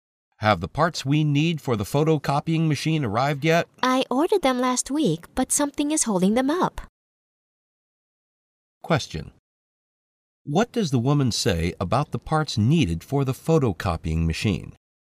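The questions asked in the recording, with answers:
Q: What does the woman say about the parts needed for the photocopying machine?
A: They haven't arrived yet; something has delayed them.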